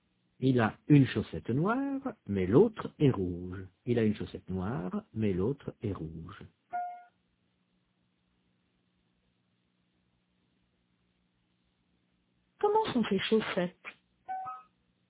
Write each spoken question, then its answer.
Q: Comment sont ses chaussettes?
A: Il a une chaussette noire, mais l'autre est rouge.